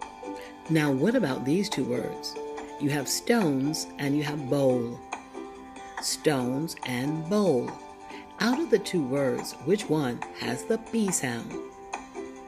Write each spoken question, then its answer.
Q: Stones and bowl. Out of the two words, which one has the B sound?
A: You are correct. Bowl has the B sound.